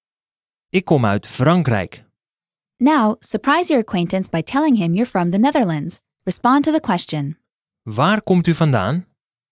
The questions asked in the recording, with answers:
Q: Waar komt u vandaan?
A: Ik kom uit Nederland.